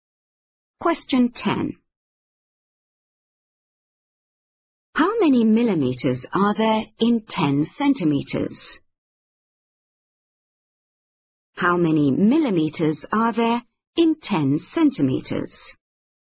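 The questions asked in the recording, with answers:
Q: How many millimeters are there in 10 centimeters?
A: 100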